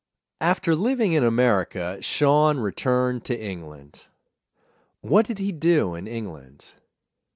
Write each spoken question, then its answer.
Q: What did he do in England?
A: He began working with wolves in a wildlife park in England.